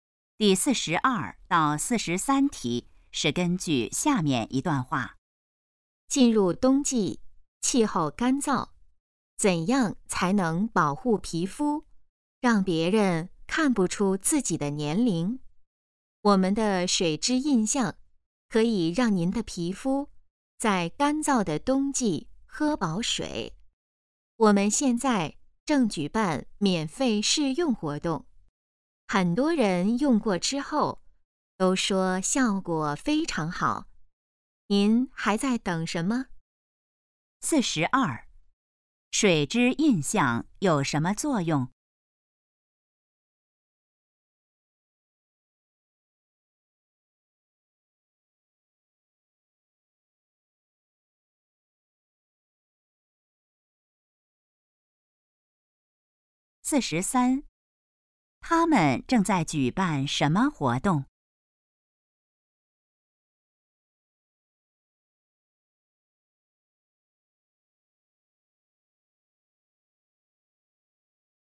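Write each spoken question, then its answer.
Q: 水质印象有什么作用?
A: 给皮肤补水

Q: 他们正在举办什么活动?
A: 免费试用活动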